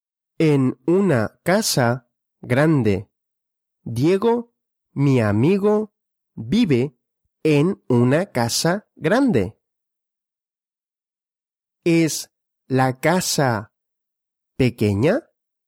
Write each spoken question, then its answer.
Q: ¿Es la casa pequeña?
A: No, la casa no es pequeña.